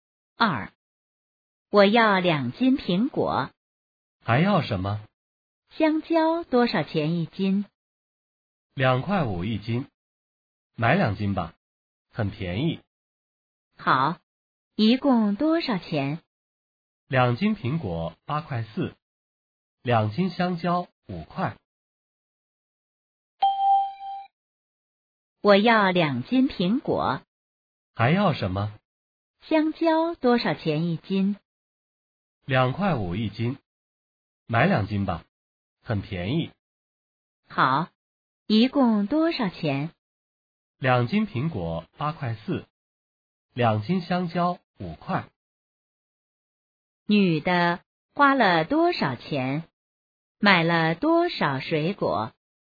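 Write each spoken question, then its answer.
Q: 女的花了多少钱?买了多少水果?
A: 13.4元,四斤(两斤苹果、两斤香蕉)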